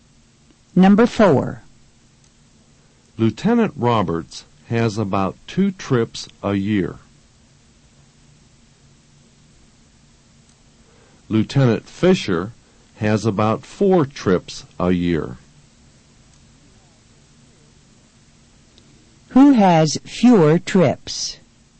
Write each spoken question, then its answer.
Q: Who has fewer trips?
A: Lieutenant Roberts has fewer trips.